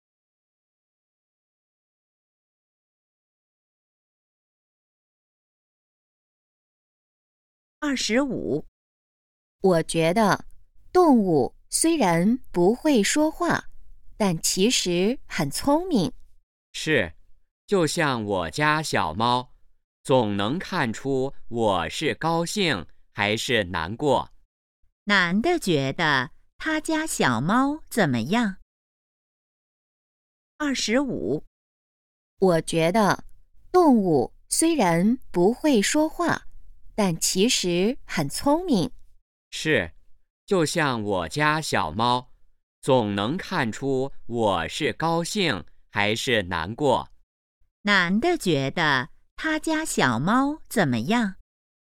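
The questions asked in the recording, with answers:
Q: 男的觉得他家小猫怎么样?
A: 很聪明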